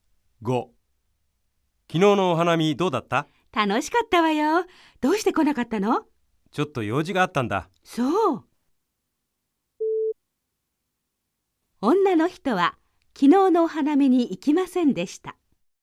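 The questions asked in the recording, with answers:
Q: 女の人は昨日のお花見に行きませんでした。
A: ×(正しくない)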